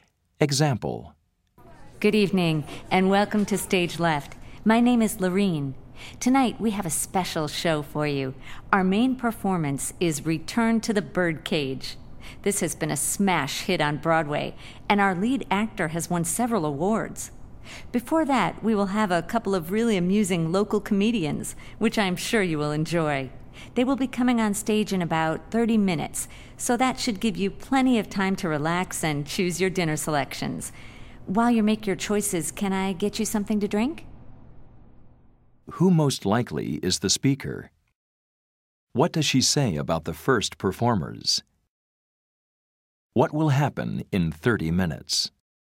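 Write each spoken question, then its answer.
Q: What does she say about the first performers?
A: They are amusing local comedians

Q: What will happen in 30 minutes?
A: The comedians will come on stage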